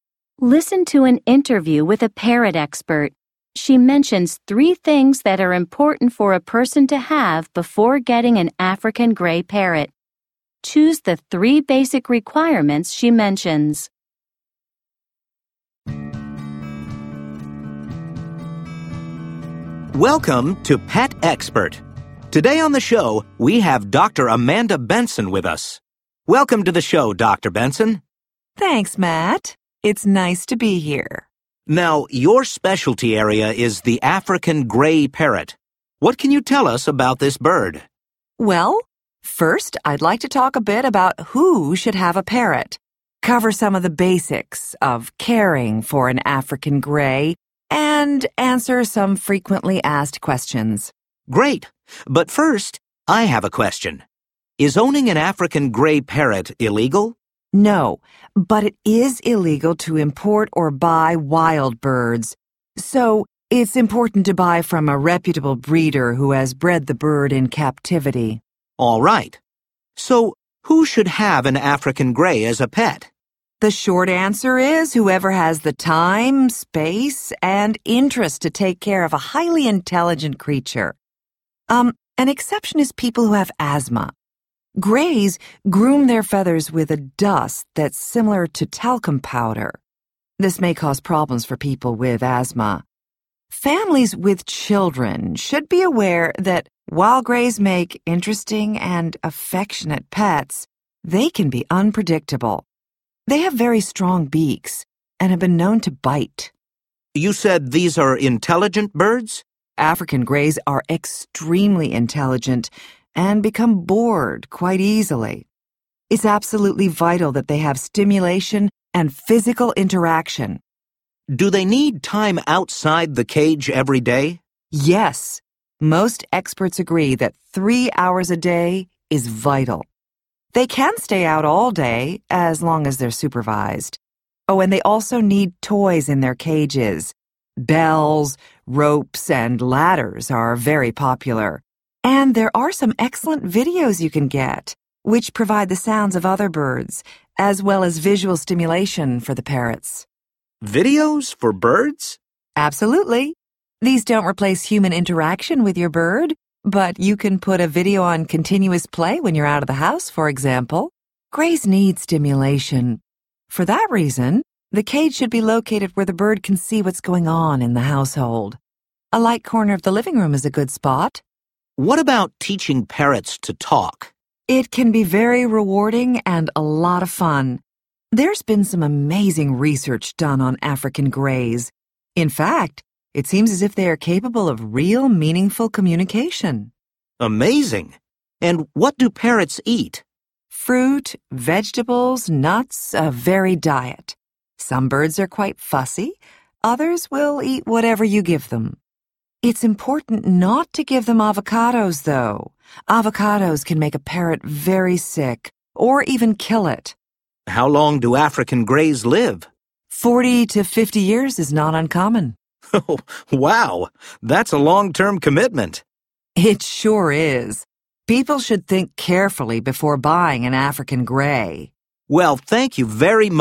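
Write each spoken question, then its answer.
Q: Choose the three basic requirements she mentions.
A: time, space, and interest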